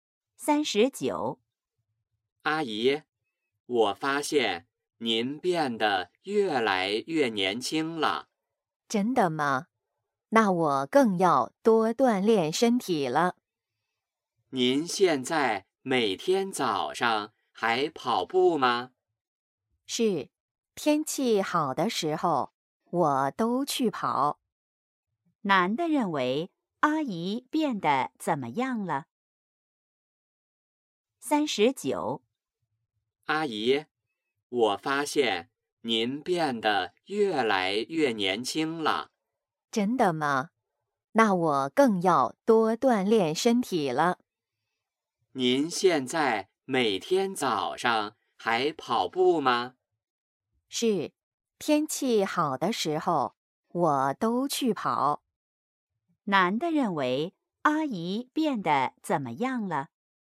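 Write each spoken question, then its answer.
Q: 男的认为阿姨变得怎么样了?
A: 越来越年轻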